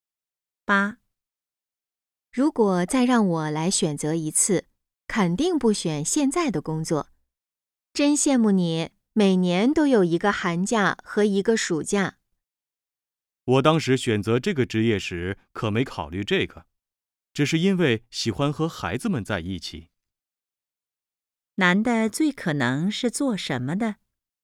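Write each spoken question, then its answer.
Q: 男的最可能是做什么的?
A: 老师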